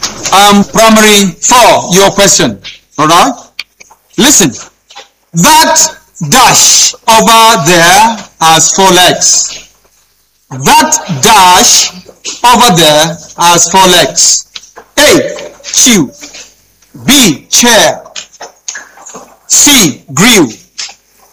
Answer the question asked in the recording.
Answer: B. Chair.